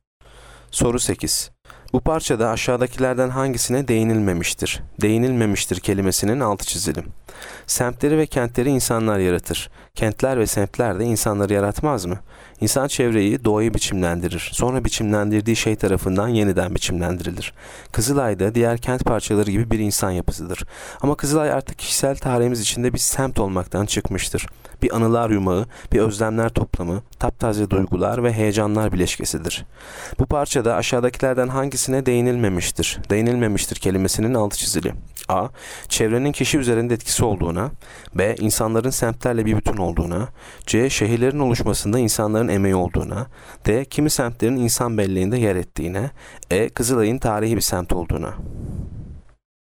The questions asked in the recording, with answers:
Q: Bu parçada aşağıdakilerden hangisine değinilmemiştir?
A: Yanıt E. Kızılay'ın tarihi bir semt olduğuna.